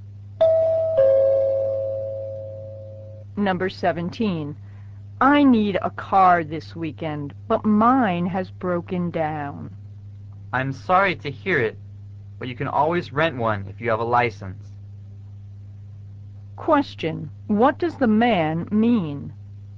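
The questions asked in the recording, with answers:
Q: What does the man mean?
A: The woman can rent a car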